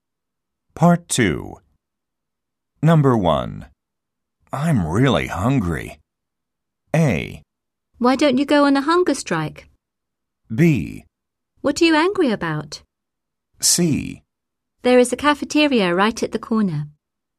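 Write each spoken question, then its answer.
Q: I'm really hungry.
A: C: There is a cafeteria right at the corner.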